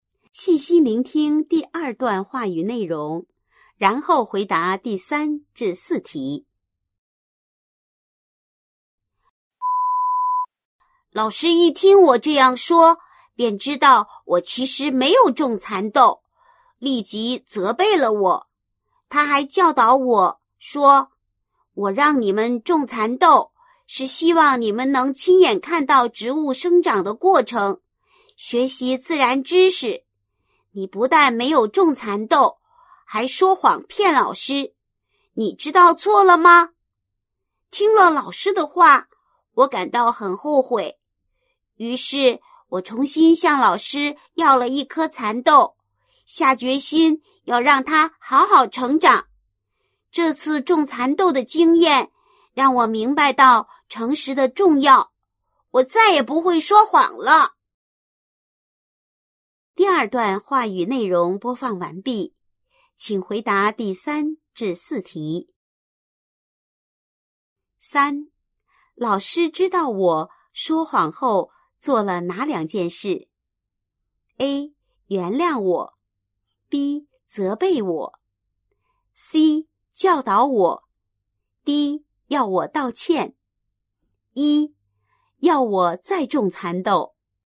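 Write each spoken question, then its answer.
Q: 老师知道我说谎后做了哪两件事? A. 原谅我, B. 责备我, C. 教导我, D. 要我道歉, E. 要我再种蚕豆。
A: B: 责备我;C: 教导我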